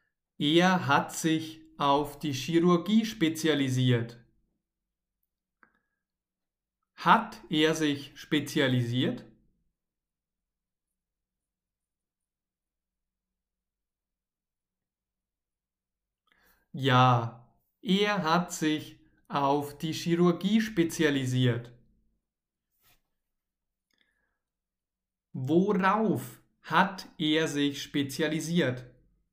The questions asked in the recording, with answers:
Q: Worauf hat er sich spezialisiert?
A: Auf die Chirurgie. Er, also Sebastian, hat sich auf die Chirurgie spezialisiert.